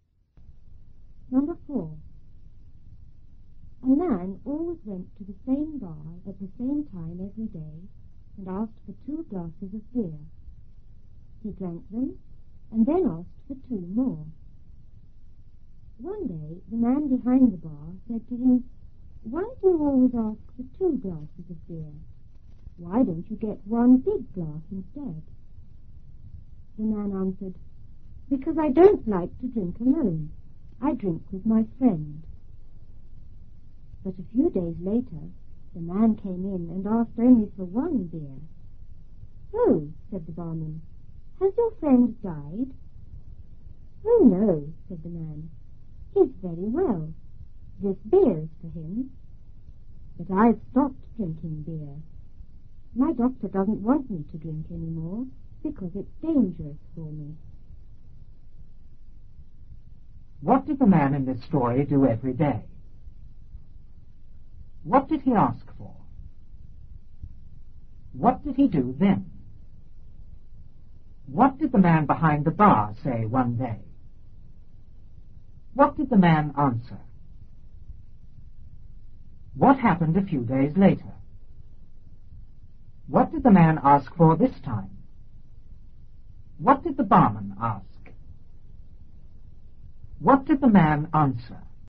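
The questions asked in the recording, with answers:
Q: What did the man in this story do every day?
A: He went to the same bar at the same time

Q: What did he ask for?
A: Two glasses of beer

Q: What did he do then?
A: He drank them and asked for two more

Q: What did the man behind the bar say one day?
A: Why do you always ask for two glasses of beer? Why don't you get one big glass instead?

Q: What did the man answer?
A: Because he didn't like to drink alone; he drank with his friend

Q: What happened a few days later?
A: The man came in and asked for only one beer

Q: What did the man ask for this time?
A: Only one beer

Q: What did the barman ask?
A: Has your friend died?

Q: What did the man answer?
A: No, his friend is very well; the beer is for him, but he has stopped drinking because his doctor says it's dangerous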